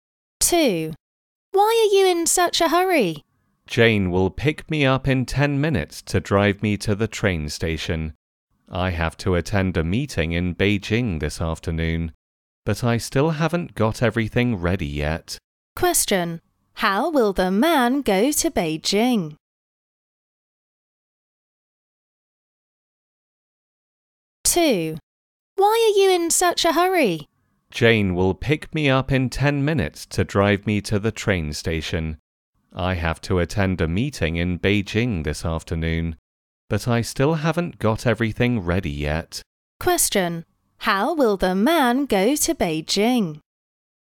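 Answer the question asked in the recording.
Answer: By train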